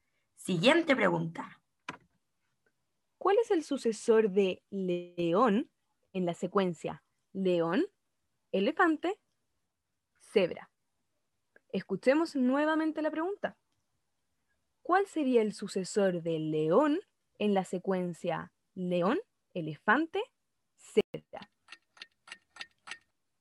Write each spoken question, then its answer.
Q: ¿Cuál es el sucesor de león en la secuencia león, elefante, cebra.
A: La respuesta correcta es elefante